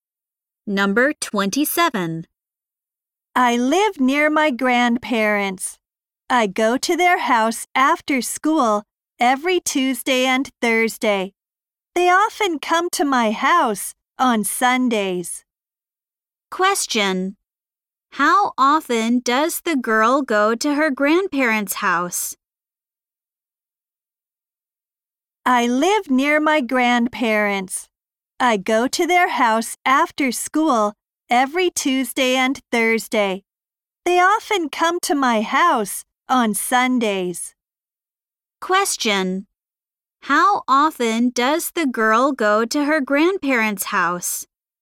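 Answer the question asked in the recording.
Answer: Twice a week (every Tuesday and Thursday)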